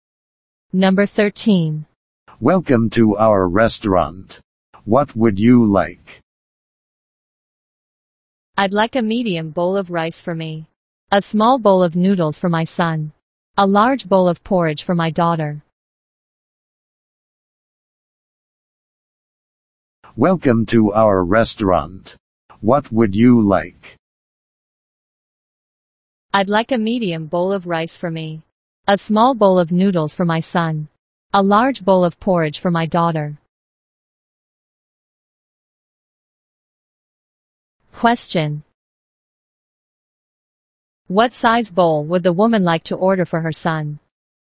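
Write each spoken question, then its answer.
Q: What size bowl would the woman like to order for her son?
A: A small bowl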